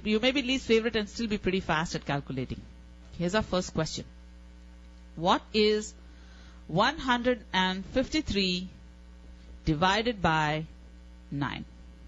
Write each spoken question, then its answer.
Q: 153 divided by 9?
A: 17 is right.